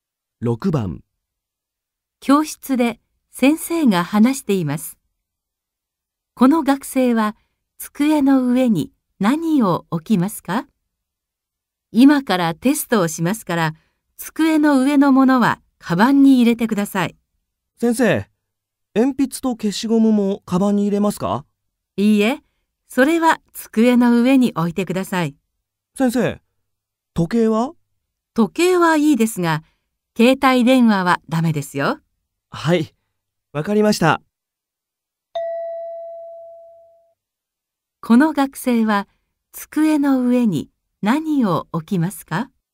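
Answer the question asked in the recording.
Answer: 鉛筆と消しゴムと時計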